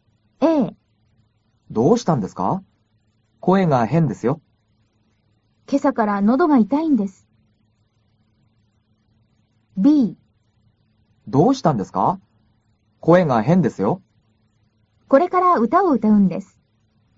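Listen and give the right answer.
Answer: A: 今朝から喉が痛いんです。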